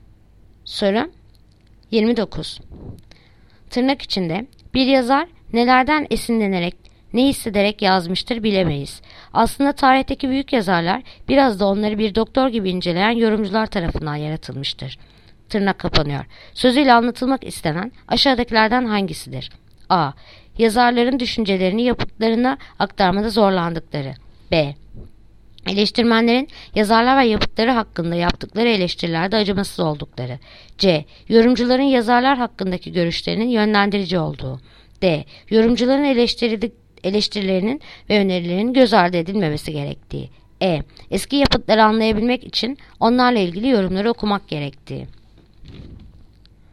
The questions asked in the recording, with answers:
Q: Sözüyle anlatılmak istenen aşağıdakilerden hangisidir?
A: Ceyhan. Yorumcuların yazarlar hakkındaki görüşlerinin yönlendirici olduğu.